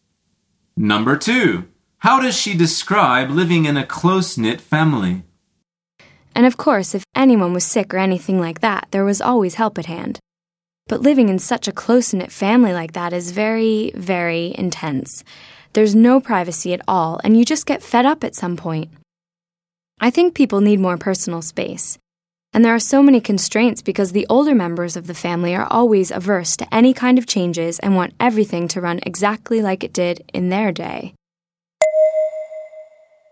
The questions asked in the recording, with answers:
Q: How does she describe living in a close-knit family?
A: The answer is very intense.